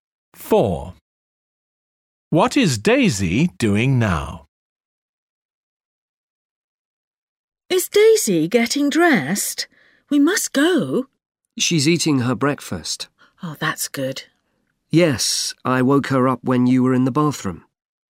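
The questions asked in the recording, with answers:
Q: What is Daisy doing now?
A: Eating her breakfast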